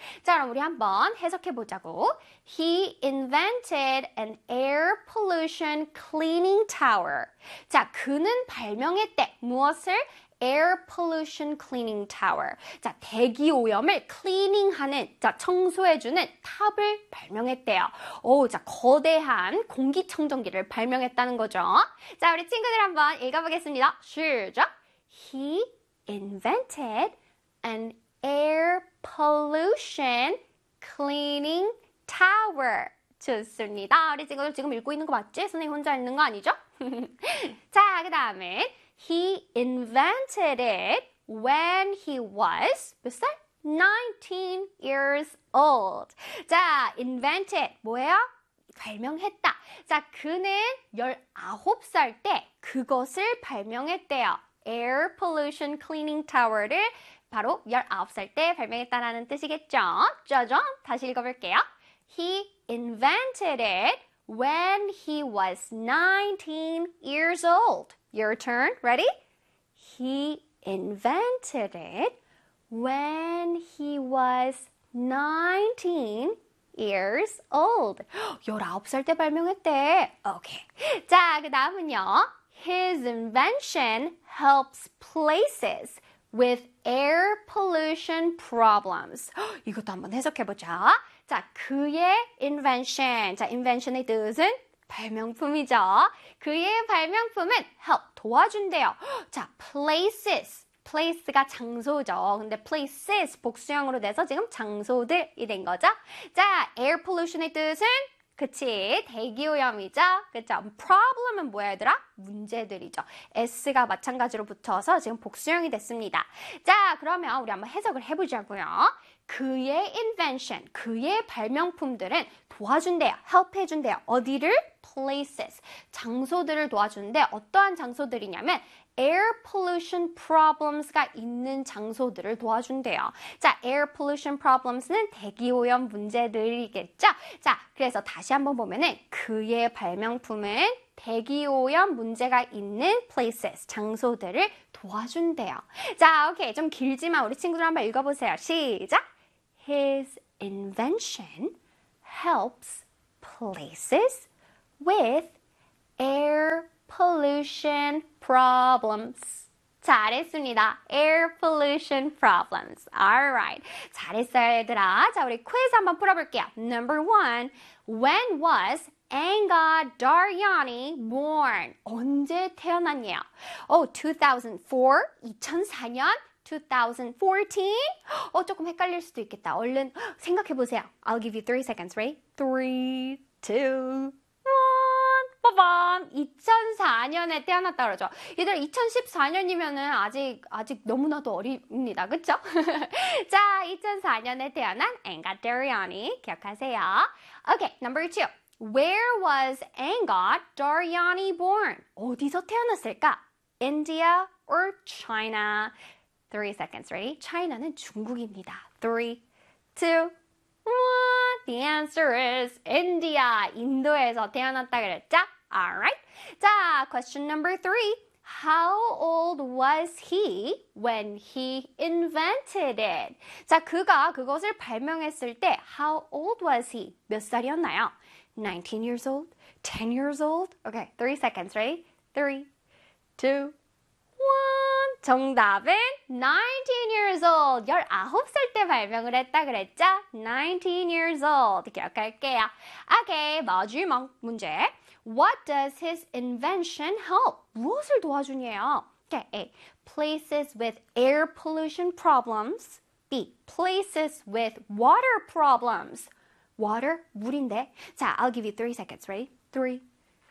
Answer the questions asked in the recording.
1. 정답은 19 years old.
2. 정답은? A 되겠죠. Air pollution problems.